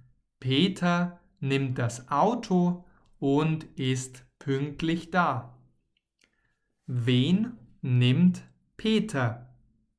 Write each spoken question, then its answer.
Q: Wen nimmt Peter?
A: Das Auto. Peter nimmt das Auto.